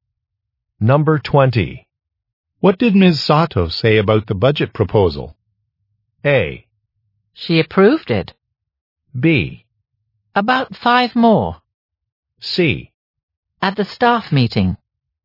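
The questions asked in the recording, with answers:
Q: What did Ms. Sato say about the budget proposal?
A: A: She approved it.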